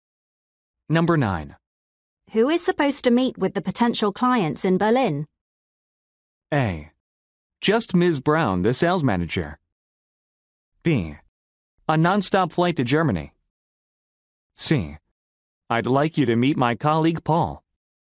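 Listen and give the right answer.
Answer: A: Just Ms. Brown, the sales manager.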